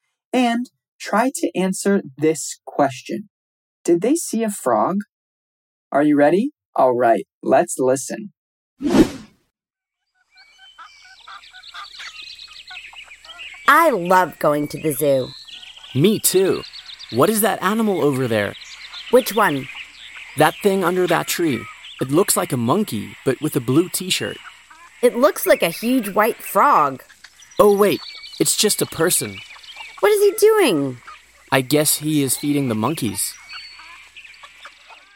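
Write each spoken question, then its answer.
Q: Did they see a frog?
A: No, it was just a person (feeding the monkeys).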